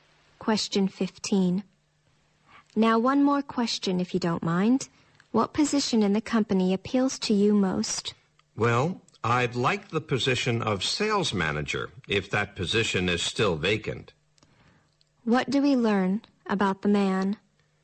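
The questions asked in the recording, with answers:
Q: What do we learn about the man?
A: He is applying for a job and would like to be sales manager.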